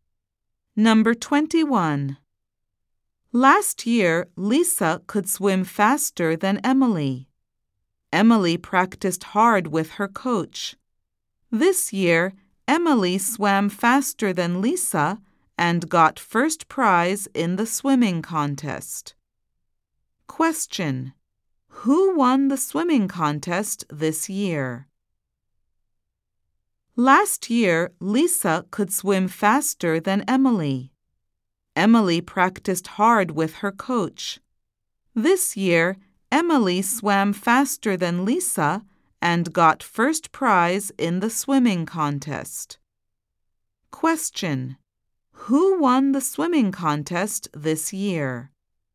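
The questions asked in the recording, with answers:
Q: Who won the swimming contest this year?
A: Emily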